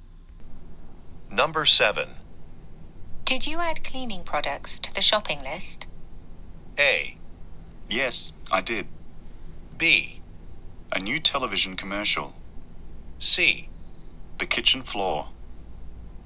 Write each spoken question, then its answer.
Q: Did you add cleaning products to the shopping list?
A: はい、しました。ということで、今回の正答はこの選択肢 A でした。